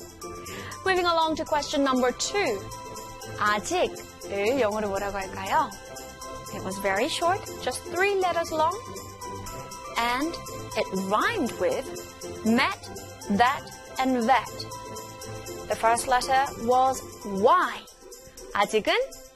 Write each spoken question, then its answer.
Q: 아직을 영어로 뭐라고 할까요?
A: Y-E-T, yet. Yet.